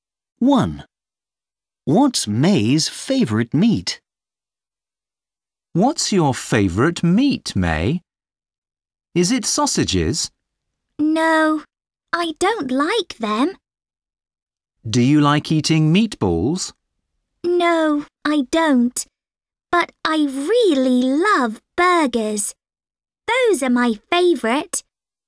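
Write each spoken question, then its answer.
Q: What's May's favourite meat?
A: burgers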